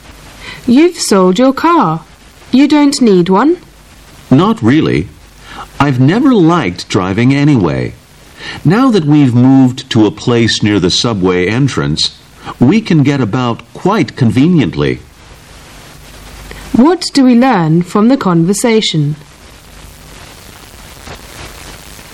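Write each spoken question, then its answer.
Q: What do we learn from the conversation?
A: The man sold his car because he lives near the subway and doesn't need one.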